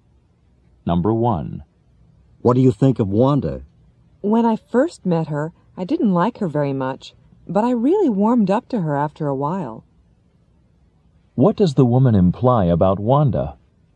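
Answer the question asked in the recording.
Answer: She didn't like Wanda at first but came to like her later.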